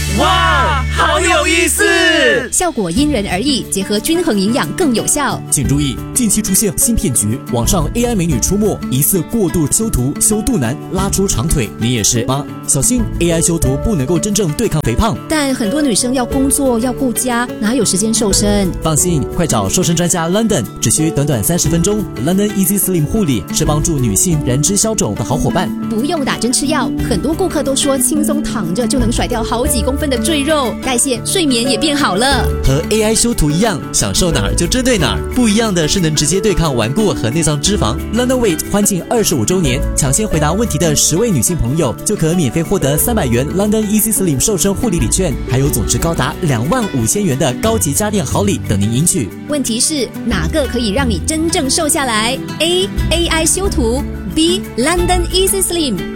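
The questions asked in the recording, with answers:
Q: 问题是哪个可以让你真正瘦下来?A AI 修图 ,B London Easy Slim。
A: B: London Easy Slim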